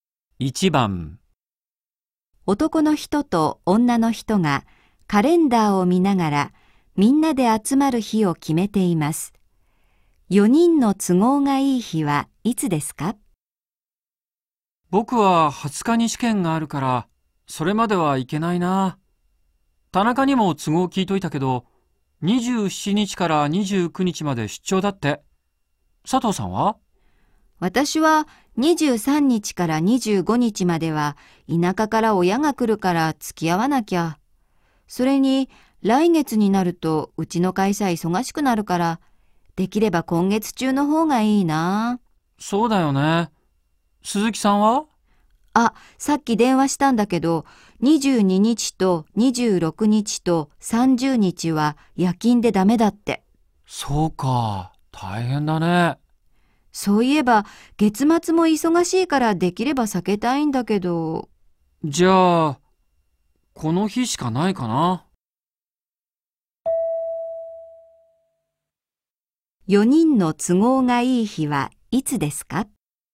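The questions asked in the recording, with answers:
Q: 4人の都合がいい日はいつですか?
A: 21日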